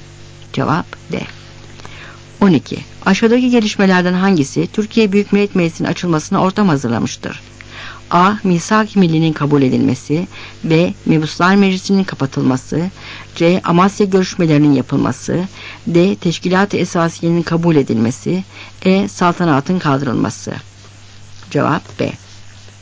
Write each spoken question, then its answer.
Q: Aşağıdaki gelişmelerden hangisi Türkiye Büyük Millet Meclisi'nin açılmasına ortam hazırlamıştır?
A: Cevap B.